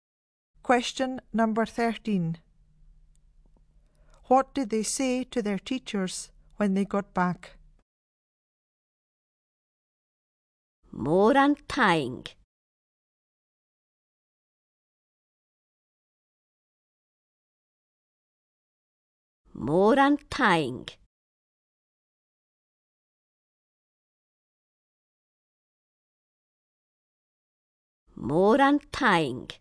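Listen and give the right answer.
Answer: Thank you very much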